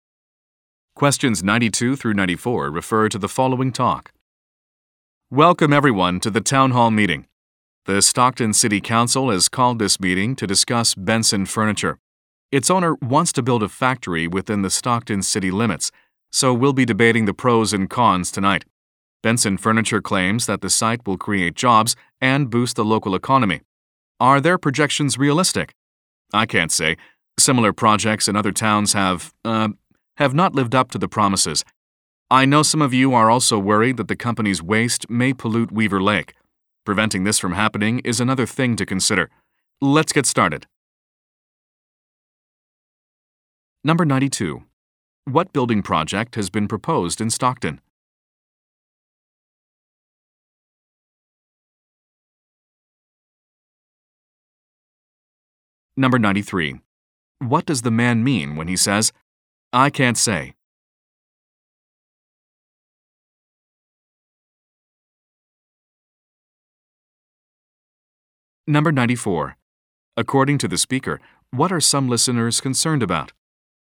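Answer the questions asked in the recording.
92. A furniture factory
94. Company waste polluting Weaver Lake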